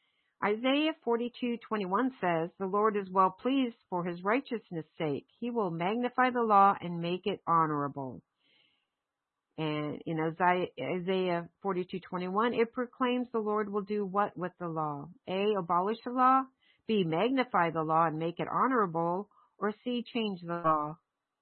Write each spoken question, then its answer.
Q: And in Isaiah 42:21, it proclaims the Lord will do what with the law?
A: It's B, he will magnify the law and make it honorable.